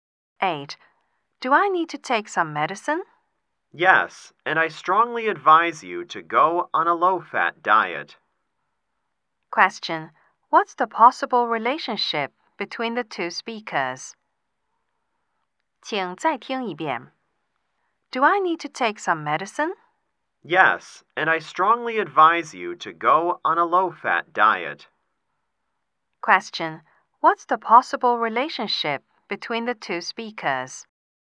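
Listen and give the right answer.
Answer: Doctor and patient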